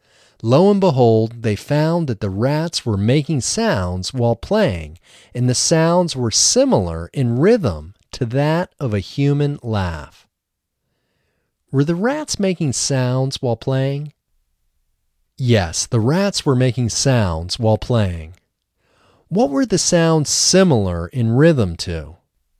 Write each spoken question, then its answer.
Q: What were the sounds similar in rhythm to?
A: The sounds were similar in rhythm to that of a human laugh.